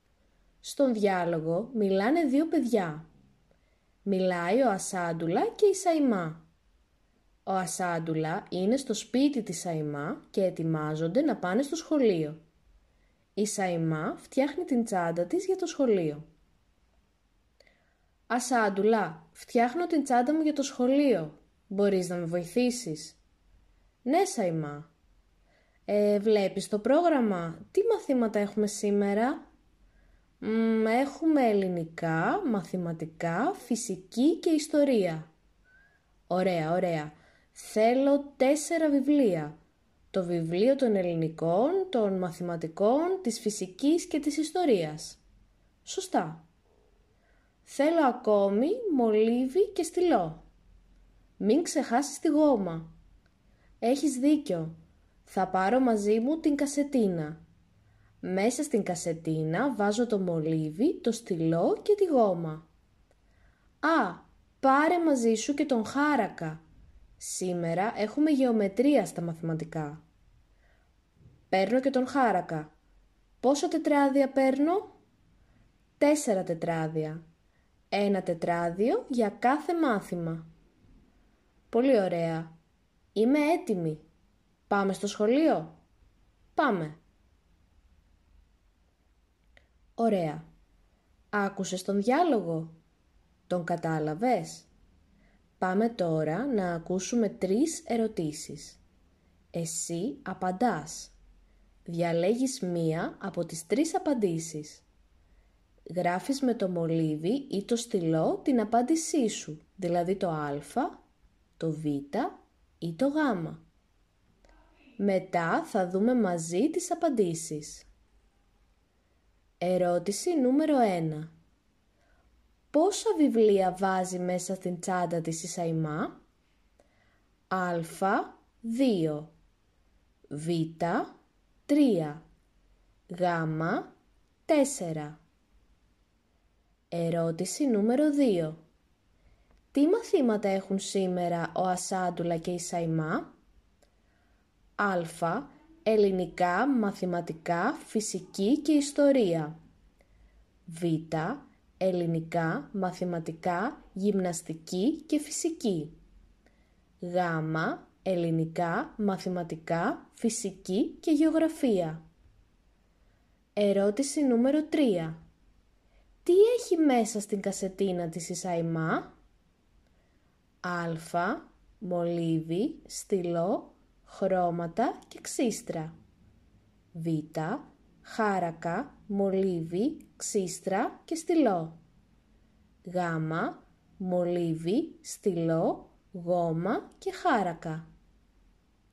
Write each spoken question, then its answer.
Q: Πόσα βιβλία βάζει μέσα στην τσάντα της η Σαϊμά?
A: Στην ερώτηση νούμερο 1, η σωστή απάντηση είναι το γάμα.

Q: Τι μαθήματα έχουν σήμερα ο Ασάντουλα και η Σαϊμά?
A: Στην ερώτηση νούμερο 2, η σωστή απάντηση είναι το α.

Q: Τι έχει μέσα στην κασετίνα της η Σαϊμά?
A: Στην ερώτηση νούμερο 3, η σωστή απάντηση είναι το γάμα.